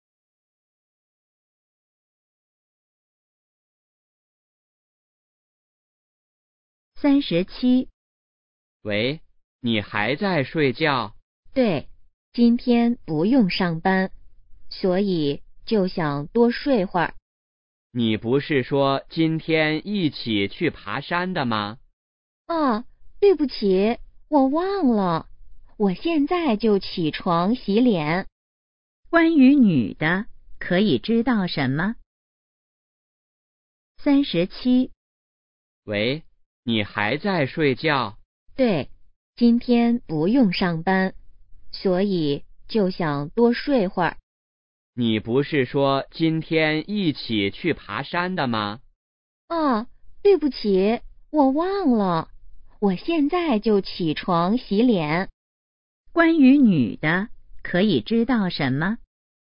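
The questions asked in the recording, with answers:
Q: 关于女的,可以知道什么?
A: 她忘了今天去爬山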